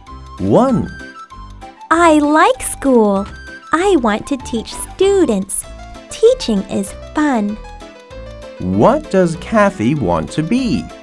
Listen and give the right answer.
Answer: She wants to be a teacher.